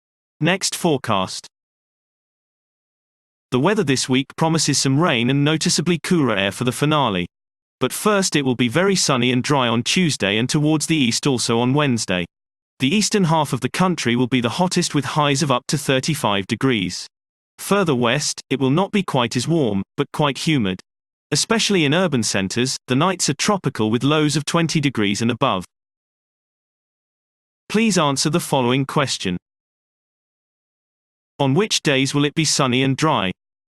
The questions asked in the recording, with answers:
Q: On which days will it be sunny and dry?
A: Sunny and dry weather is forecast for Tuesday and Wednesday.